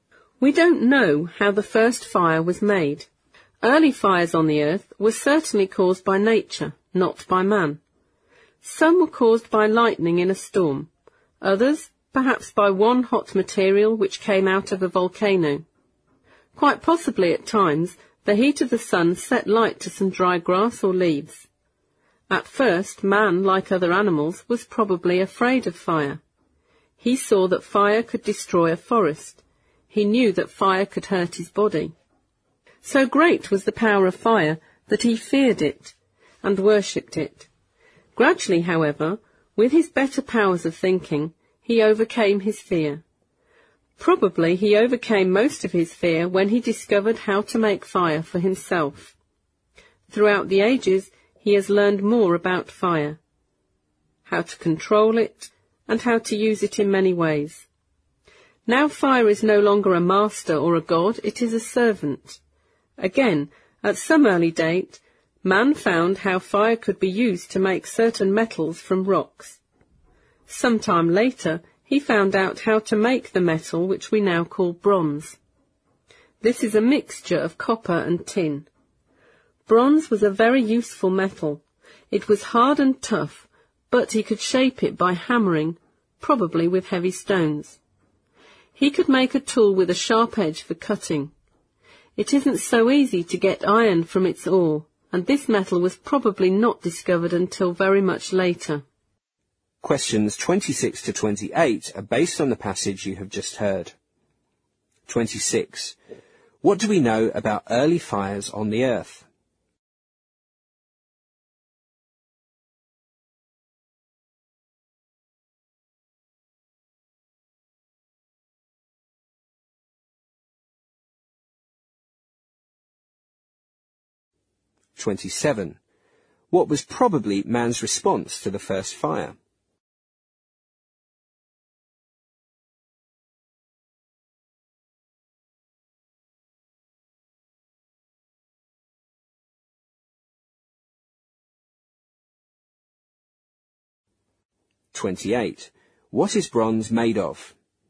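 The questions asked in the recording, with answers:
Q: What do we know about early fires on the earth?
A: They were caused by nature, not by man

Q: What was probably man's response to the first fire?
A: He was afraid of it

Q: What is bronze made of?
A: Copper and tin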